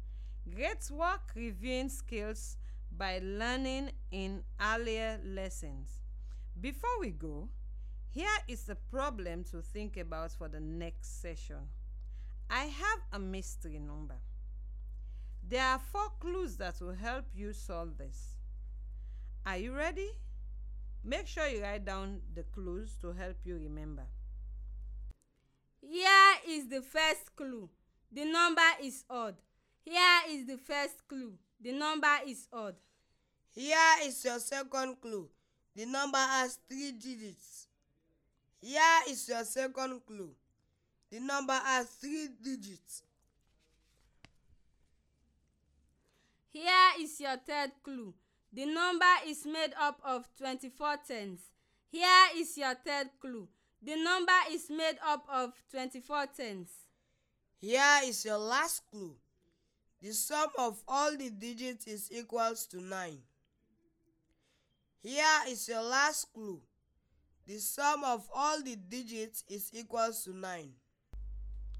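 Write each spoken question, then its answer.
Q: I have a mystery number.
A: 243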